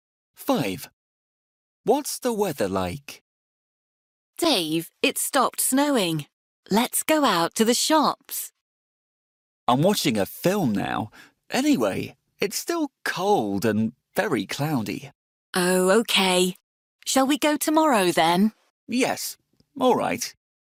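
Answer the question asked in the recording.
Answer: Cold and very cloudy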